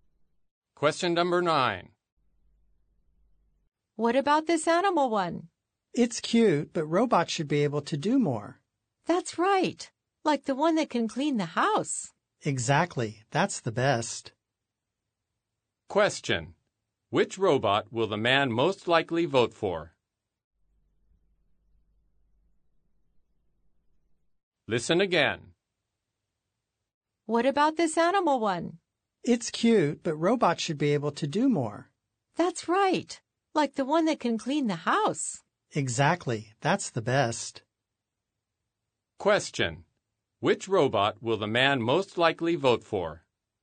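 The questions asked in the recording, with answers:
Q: Which robot will the man most likely vote for?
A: The robot that can clean the house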